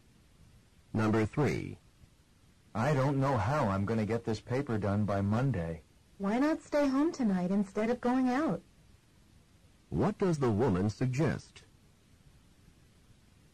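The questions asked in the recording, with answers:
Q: What does the woman suggest?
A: Staying home tonight to work on the paper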